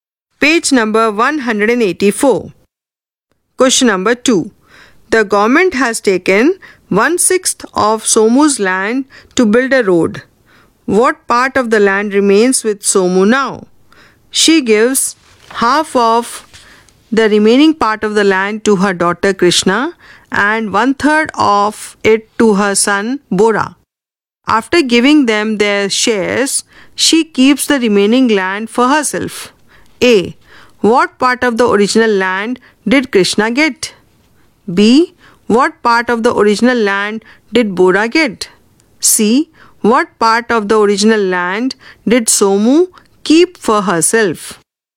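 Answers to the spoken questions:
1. 5/6
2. 5/12
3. 5/18
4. 5/36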